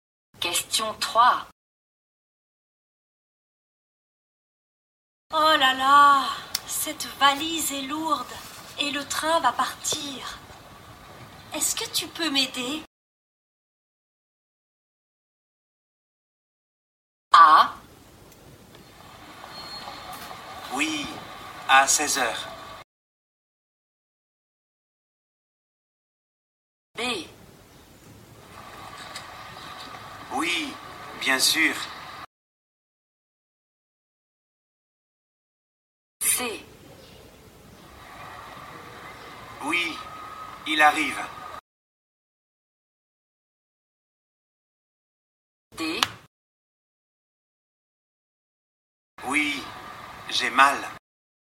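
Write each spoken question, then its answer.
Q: Est-ce que tu peux m'aider?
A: B: Oui, bien sûr.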